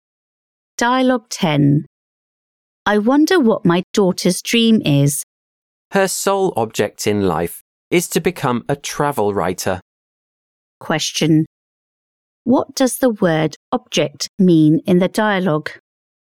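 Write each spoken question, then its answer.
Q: What does the word object mean in the dialogue?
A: aim, goal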